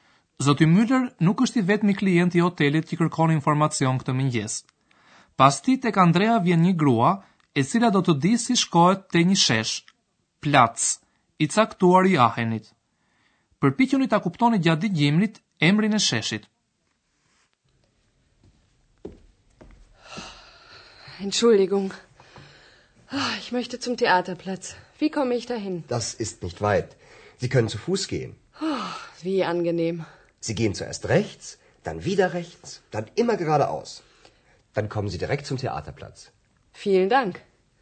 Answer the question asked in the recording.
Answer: Gruaja dëshiron të shkoj në sheshin e teatrit, Theaterplatz.